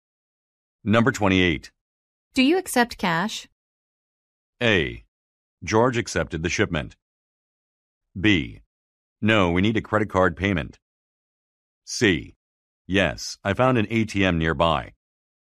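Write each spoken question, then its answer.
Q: Do you accept cash?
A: B: No, we need a credit card payment.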